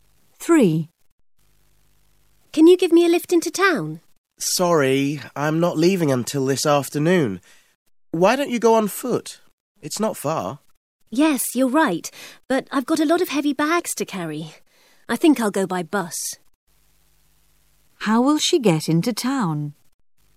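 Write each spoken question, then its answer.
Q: How will she get into town?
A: By bus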